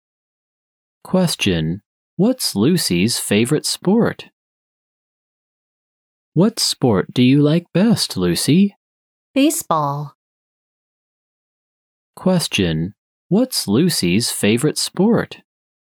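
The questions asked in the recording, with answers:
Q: What's Lucy's favorite sport?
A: Baseball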